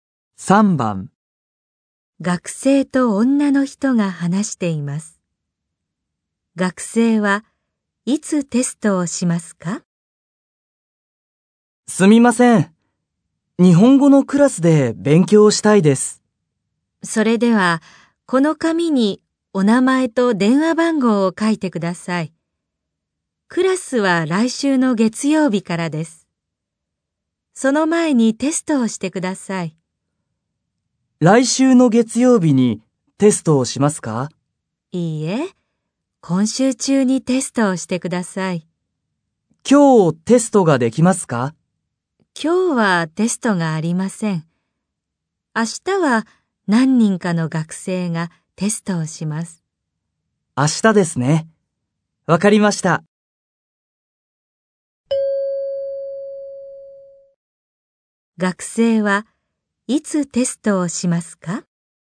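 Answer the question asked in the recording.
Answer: 明日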